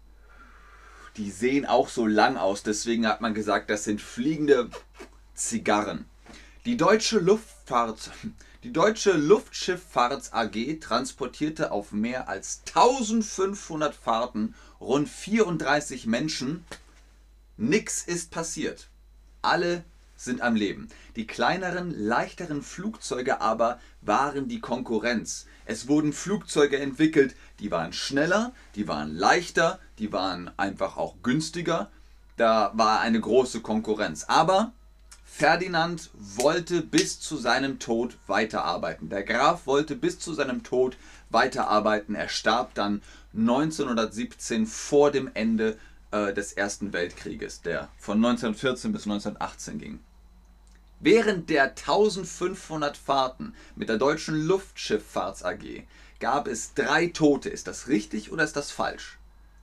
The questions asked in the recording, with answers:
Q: Während der 1500 Fahrten mit der deutschen Luftschifffahrts AG gab es drei Tote.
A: Nein, 1500 Fahrten und es gab keine Toten.